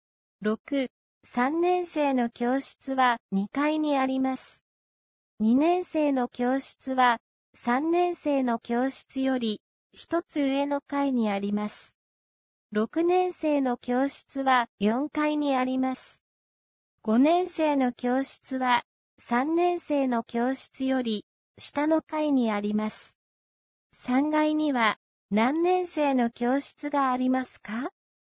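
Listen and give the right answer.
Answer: 2年生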